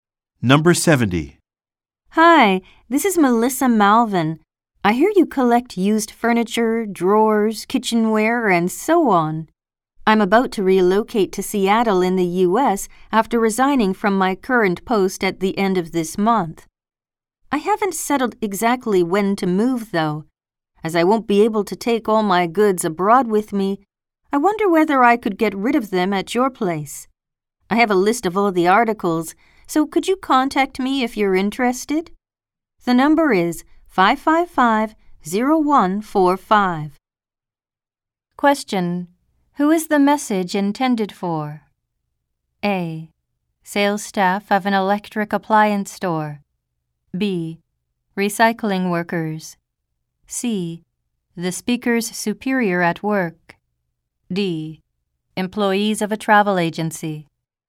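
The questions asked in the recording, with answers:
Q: Who is the message intended for?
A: B: Recycling workers.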